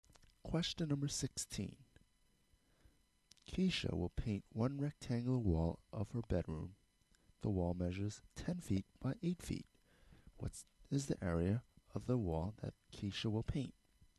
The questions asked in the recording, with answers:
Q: What is the area of the wall that Keisha will paint?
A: A equals 80 square feet.